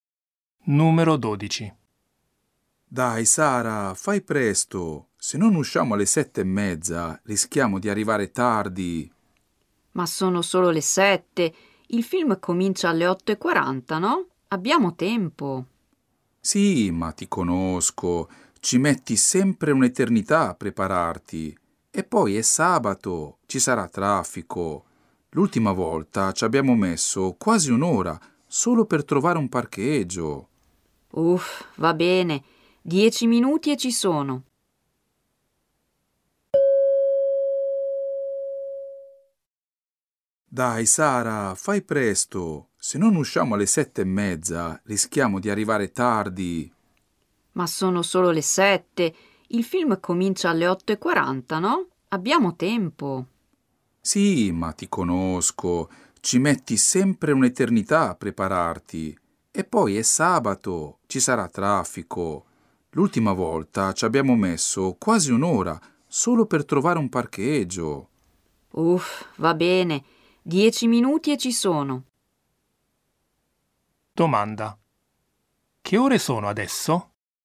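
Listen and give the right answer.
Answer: Le 7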